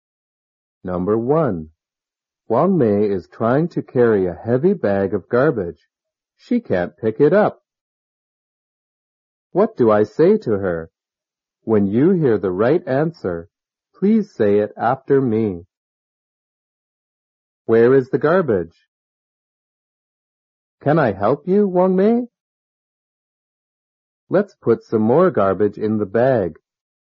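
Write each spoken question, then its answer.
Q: What do I say to her?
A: Can I help you, Wang Mei?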